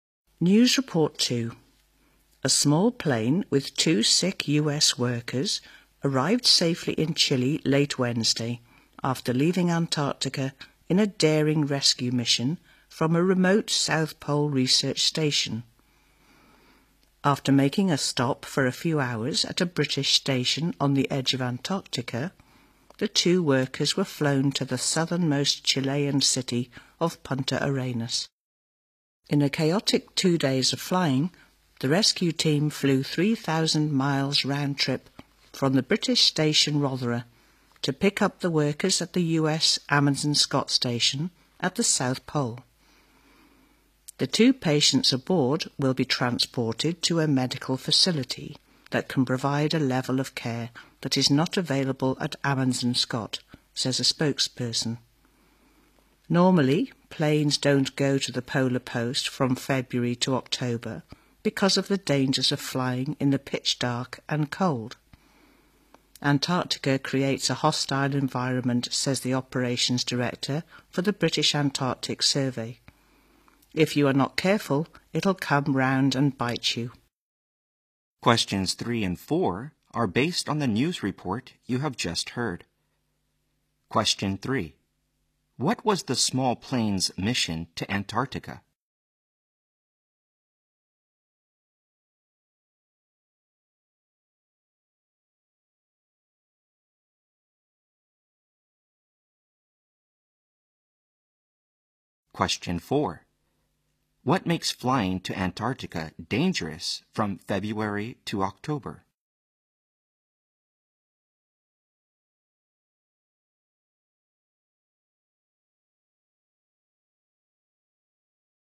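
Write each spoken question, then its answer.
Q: What was the small plane's mission to Antarctica?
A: To rescue two sick US workers from the South Pole research station

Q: What makes flying to Antarctica dangerous from February to October?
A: The pitch dark and the cold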